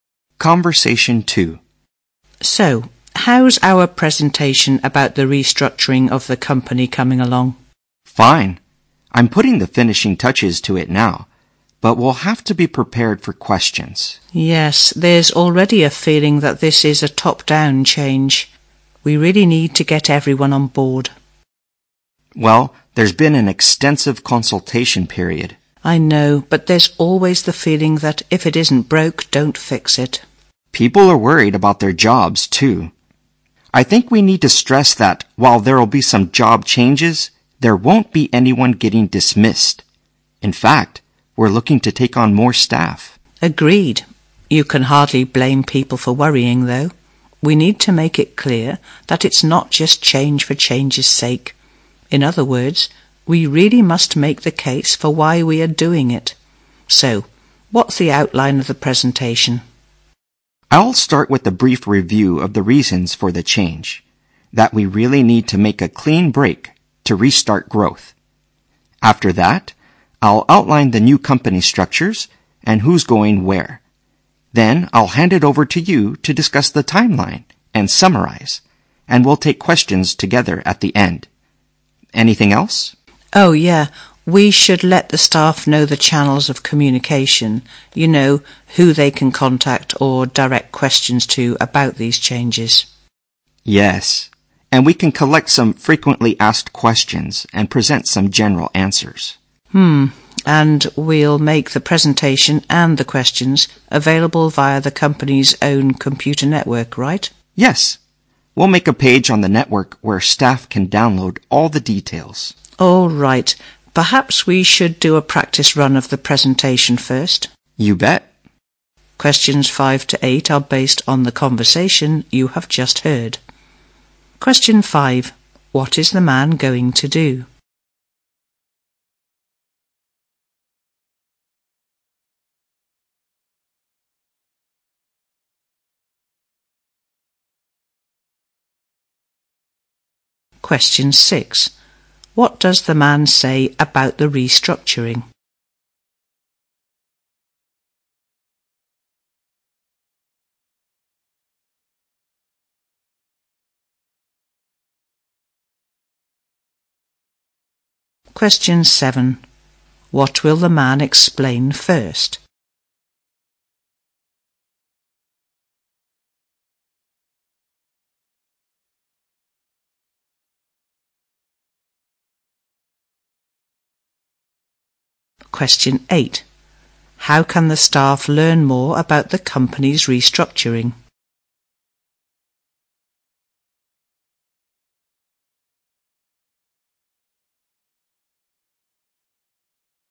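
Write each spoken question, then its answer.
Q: What is the man going to do?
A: Give a presentation about restructuring the company

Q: What does the man say about the restructuring?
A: No one will be dismissed; they plan to take on more staff

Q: What will the man explain first?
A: The reasons for the change

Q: How can the staff learn more about the company's restructuring?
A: By downloading details from a page on the company's computer network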